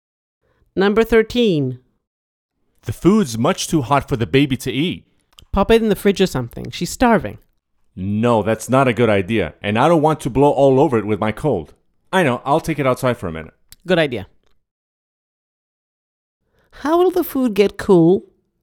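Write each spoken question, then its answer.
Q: How will the food get cool?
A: By taking it outside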